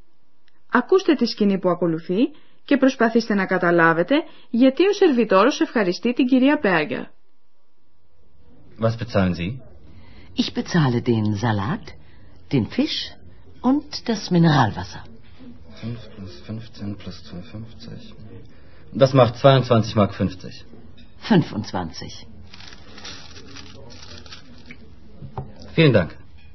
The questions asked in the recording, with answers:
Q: Ακούστε τη σκηνή που ακολουθεί και προσπαθήστε να καταλάβετε γιατί ο σερβιτόρος ευχαριστεί την κυρία Μπέργκερ.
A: Ο σερβιτόρος ευχαριστεί για το φιλοδόρημα που πήρε από την κυρία Μπέργκερ.